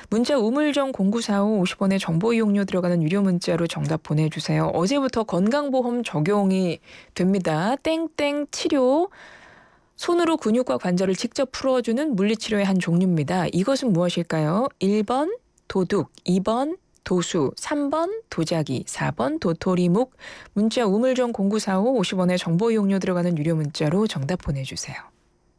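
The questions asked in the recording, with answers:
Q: 이것은 무엇일까요?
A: 2: 도수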